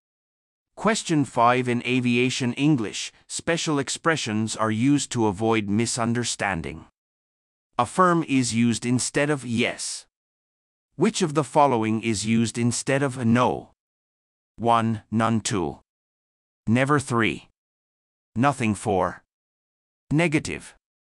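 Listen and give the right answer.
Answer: 4: Negative.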